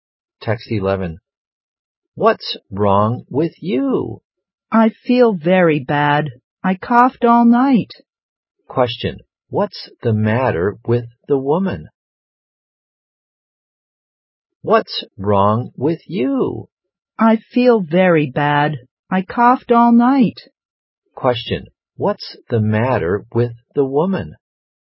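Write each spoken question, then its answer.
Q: What's the matter with the woman?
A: She has a bad cough.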